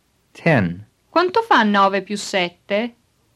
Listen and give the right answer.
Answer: 9 più 7 fa 16.